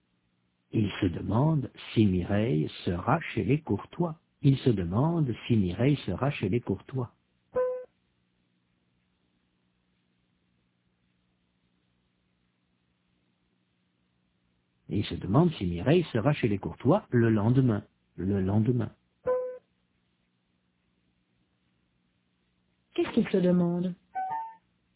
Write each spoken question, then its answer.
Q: Qu'est-ce qu'il se demande ?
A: Si Mireille sera chez les Courtois le lendemain.